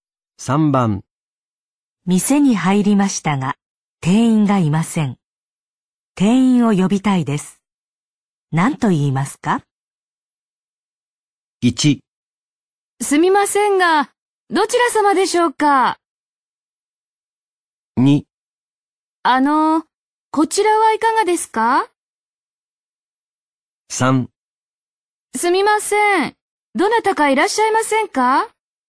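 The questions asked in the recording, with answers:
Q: 何と言いますか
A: 3: すみません、どなたかいらっしゃいませんか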